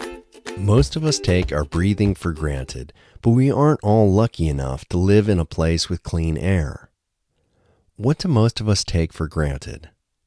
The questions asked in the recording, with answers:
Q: What do most of us take for granted?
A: Most of us take breathing for granted.